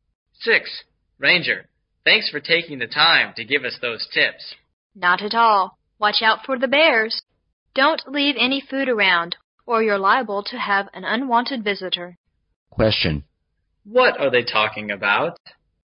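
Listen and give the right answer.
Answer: Safety tips for camping near bears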